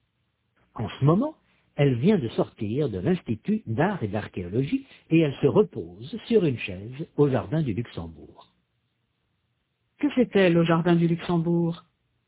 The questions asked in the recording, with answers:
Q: Que fait-elle au jardin du Luxembourg?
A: Elle se repose.